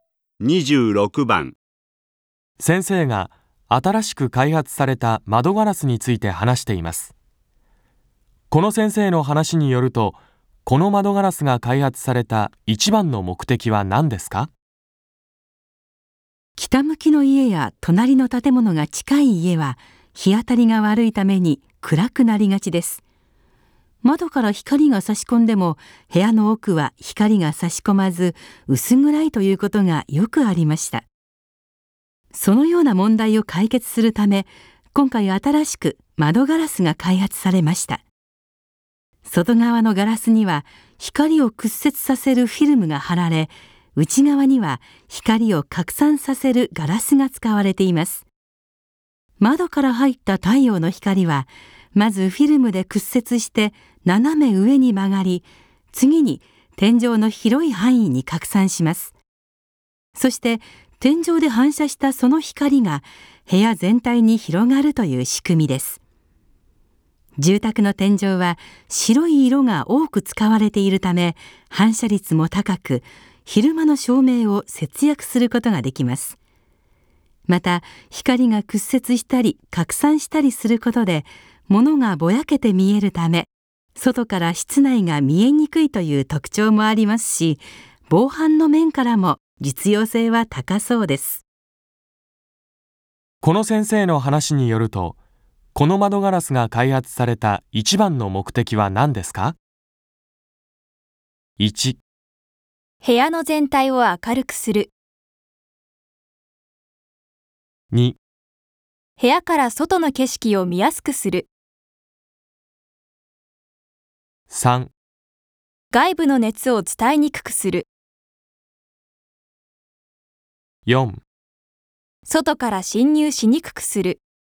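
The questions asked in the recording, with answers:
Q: この先生の話によると、この窓ガラスが開発された一番の目的は何ですか?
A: 1: 部屋の全体を明るくする。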